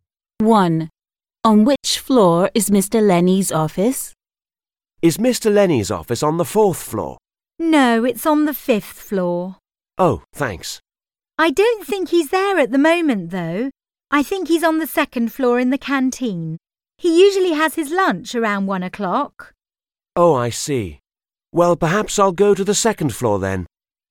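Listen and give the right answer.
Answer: the fifth floor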